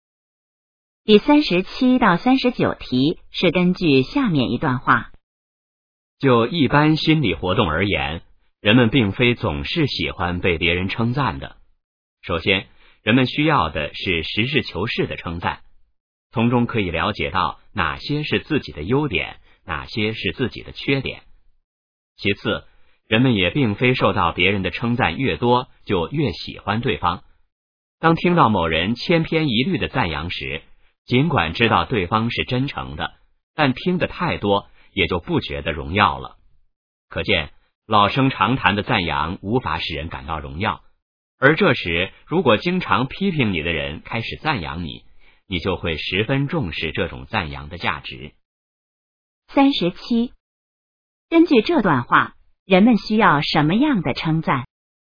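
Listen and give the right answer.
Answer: 实事求是的称赞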